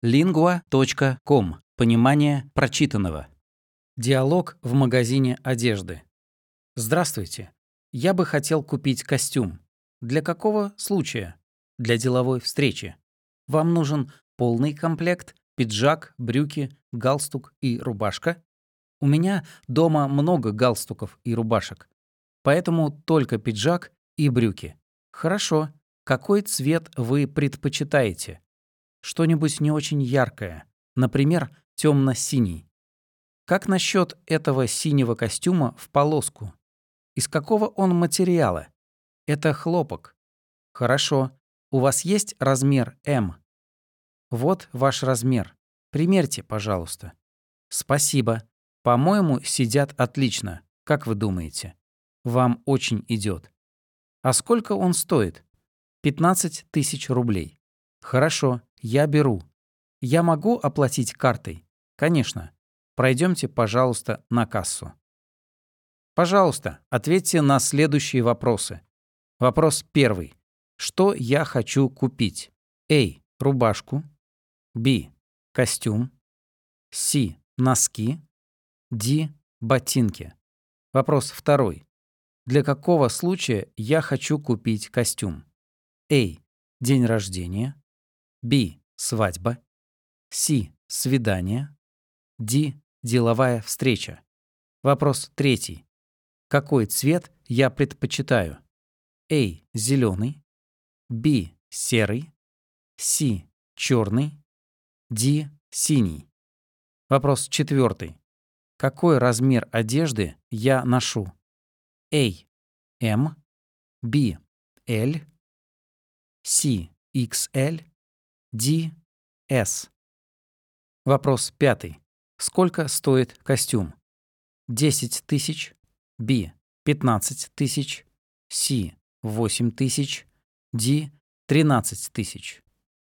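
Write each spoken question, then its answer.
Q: Что я хочу купить?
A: B: Костюм

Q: Для какого случая я хочу купить костюм?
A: D: Деловая встреча

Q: Какой цвет я предпочитаю?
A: D: Синий

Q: Какой размер одежды я ношу?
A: A: M

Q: Сколько стоит костюм?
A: B: 15 000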